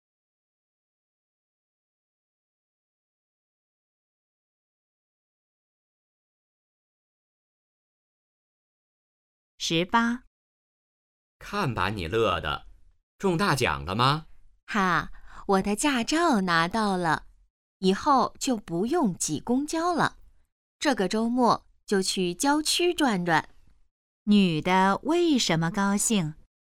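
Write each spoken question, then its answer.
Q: 女的为什么高兴?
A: 拿到了驾照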